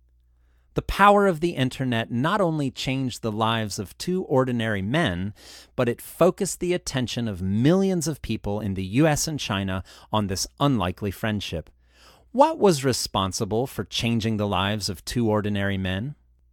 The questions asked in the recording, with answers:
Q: What was responsible for changing the lives of two ordinary men?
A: The power of the internet was responsible for changing the lives of two ordinary men.